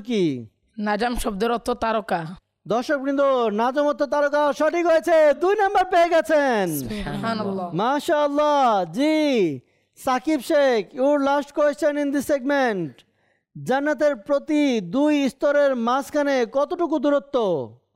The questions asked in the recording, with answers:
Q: জান্নাতের প্রতি দুই স্তরের মাঝখানে কতটুকু দূরত্ব?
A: আসমান এবং জমিনের মধ্যে যত দূরত্ব তত দূরত্ব। উত্তরটি সঠিক হয়েছে